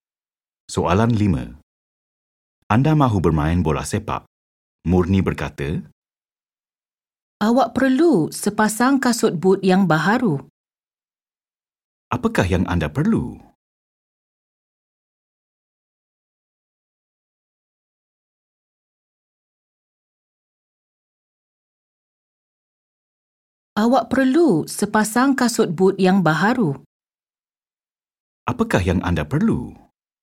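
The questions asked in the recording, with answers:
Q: Apakah yang anda perlu?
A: sepasang kasut but yang baharu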